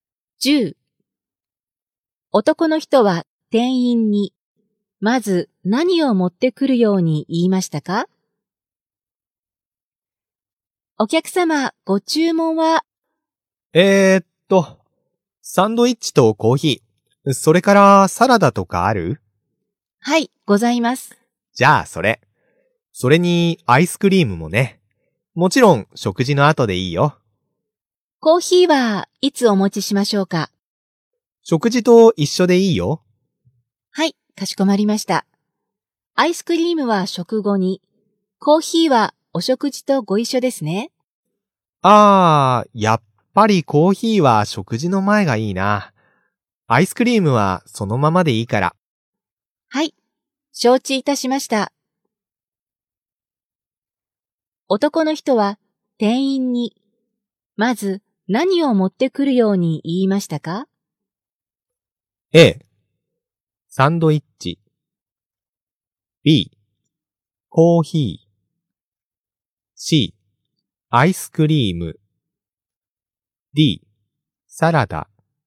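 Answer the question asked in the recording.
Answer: B: コーヒー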